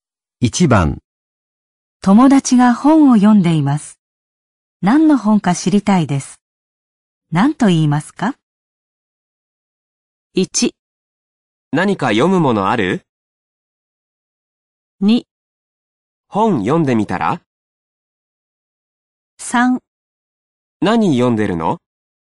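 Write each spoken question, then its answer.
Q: 友達が本を読んでいます。何の本か知りたいです。何と言いますか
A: 3: 何読んでるの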